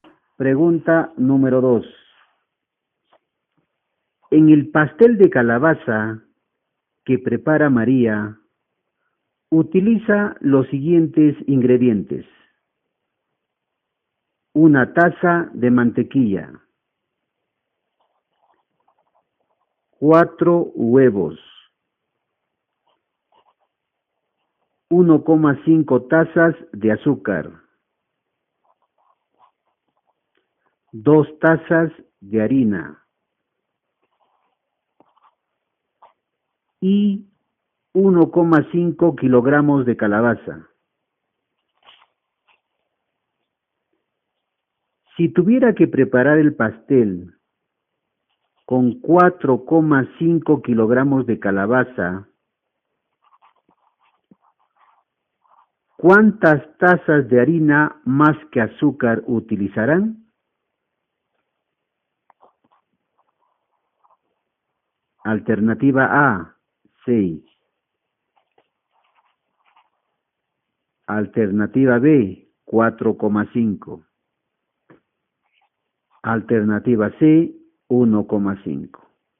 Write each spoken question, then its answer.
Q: Si tuviera que preparar el pastel con 4,5 kilogramos de calabaza, ¿cuántas tazas de harina más que azúcar utilizarán?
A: La respuesta correcta es la alternativa C, 1,5.